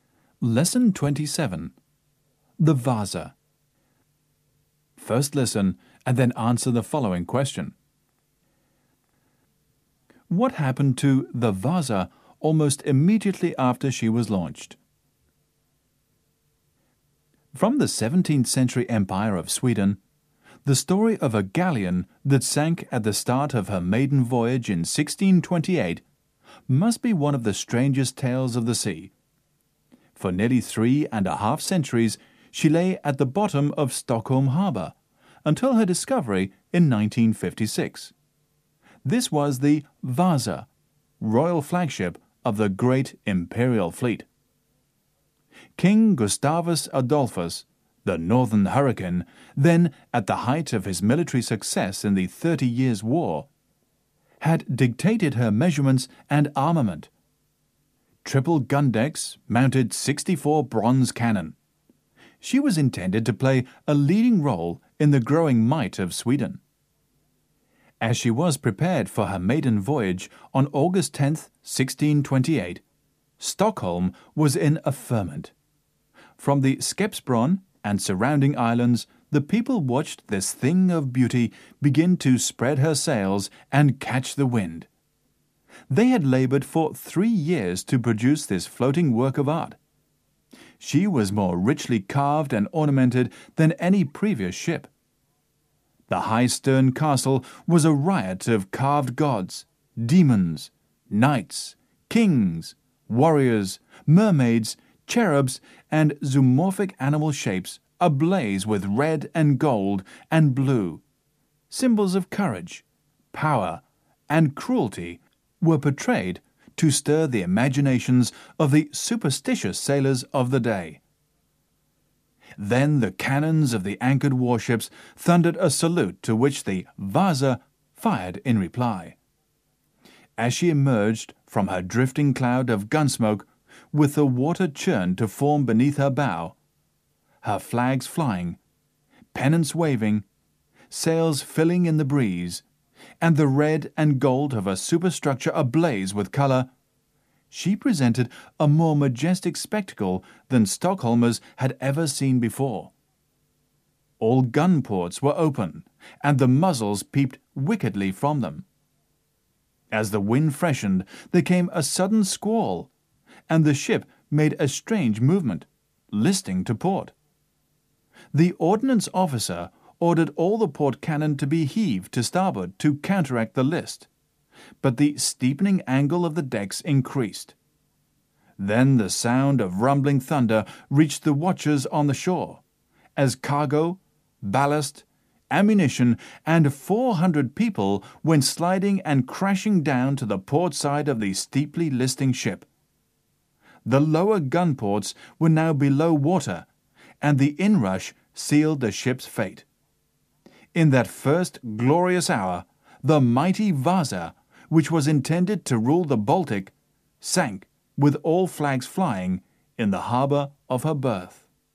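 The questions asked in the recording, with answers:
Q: What happened to the Vaza almost immediately after she was launched?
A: She listed to port in a sudden squall and sank in Stockholm harbour.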